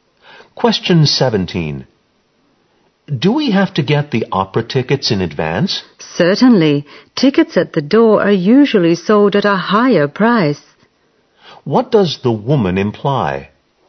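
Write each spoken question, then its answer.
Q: What does the woman imply?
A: They should get the tickets in advance, because tickets at the door usually cost more.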